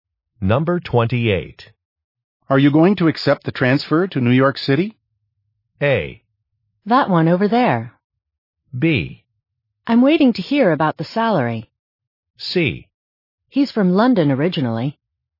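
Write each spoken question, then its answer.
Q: Are you going to accept the transfer to New York City?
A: B: I'm waiting to hear about the salary.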